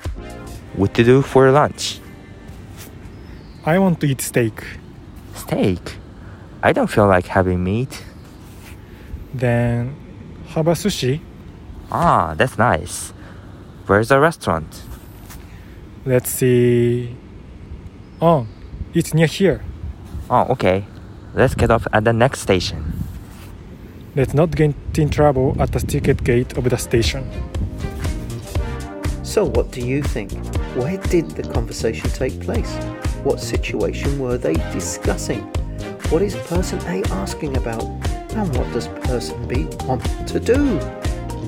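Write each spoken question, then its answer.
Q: What situation were they discussing?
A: Deciding where to eat lunch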